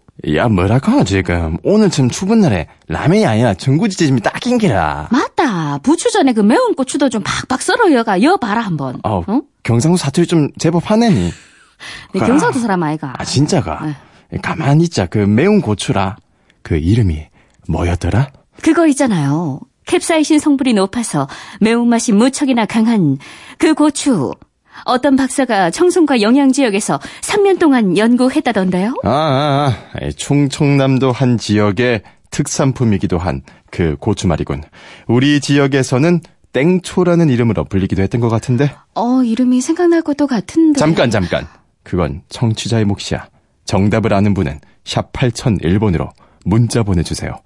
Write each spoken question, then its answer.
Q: 가만히 있자 그 매운 고추라 그 이름이 뭐였더라?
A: 정답은 청양고추였고요.